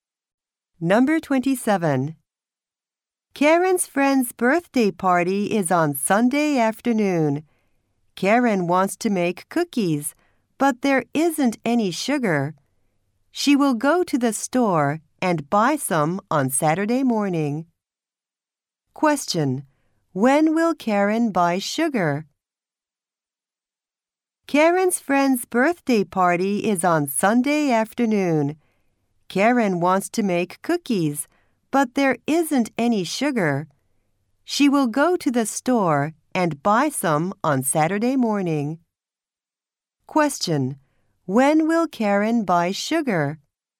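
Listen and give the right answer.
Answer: On Saturday morning.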